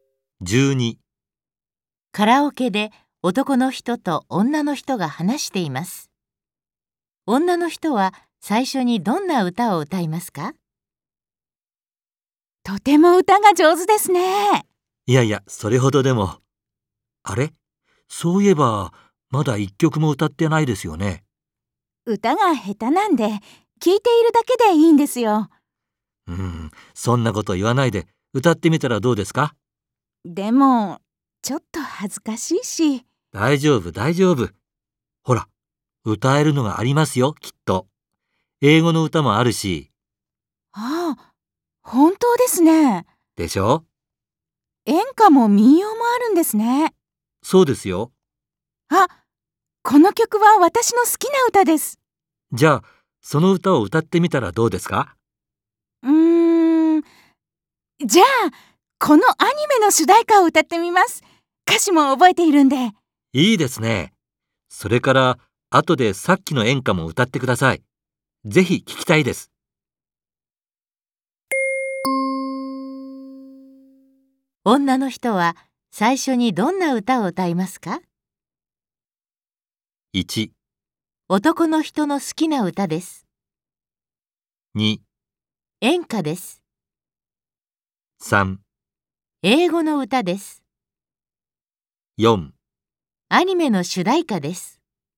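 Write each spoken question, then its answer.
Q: 女の人は最初にどんな歌を歌いますか?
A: 4: アニメの主題歌です。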